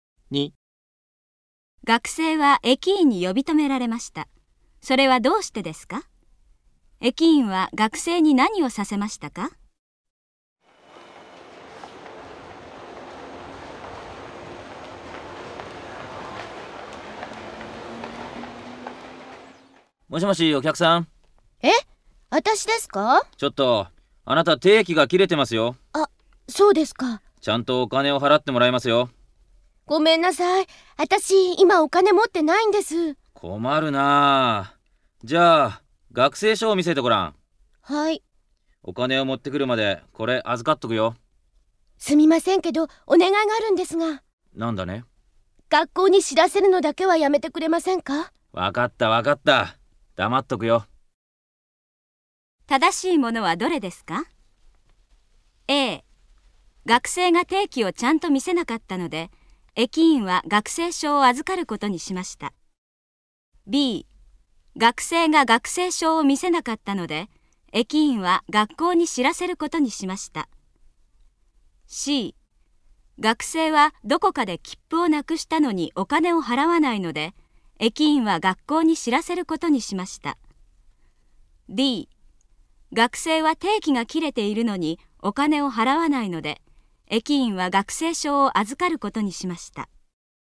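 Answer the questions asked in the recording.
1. 定期が切れていたから
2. 学生証を見せさせた
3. D: 学生は定期が切れているのにお金を払わないので、駅員は学生証を預かることにしました。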